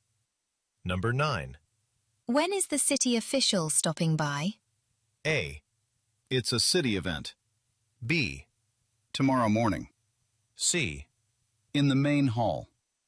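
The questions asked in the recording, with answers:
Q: When is the city official stopping by?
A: B: Tomorrow morning.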